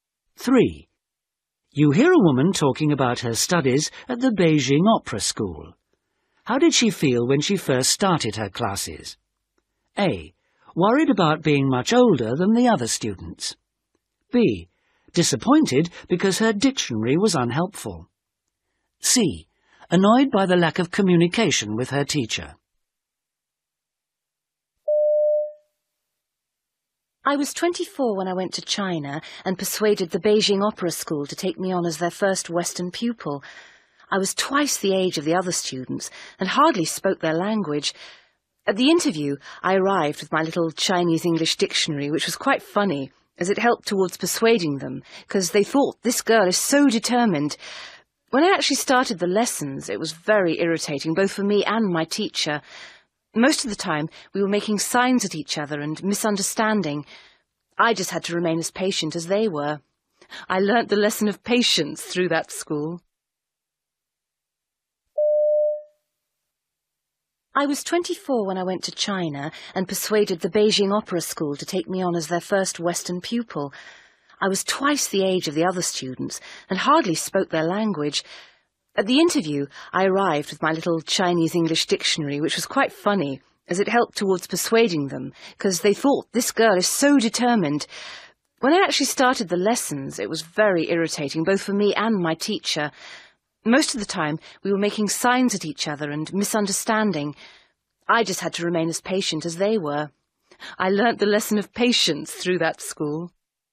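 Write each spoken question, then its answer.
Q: How did she feel when she first started her classes?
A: C: Annoyed by the lack of communication with her teacher.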